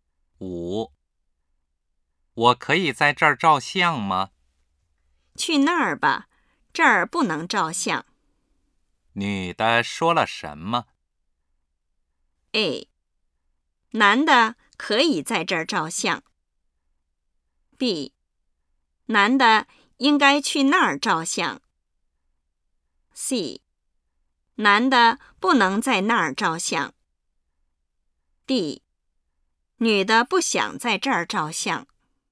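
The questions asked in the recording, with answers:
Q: 女的说了什么?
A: B: 男的应该去那儿照相。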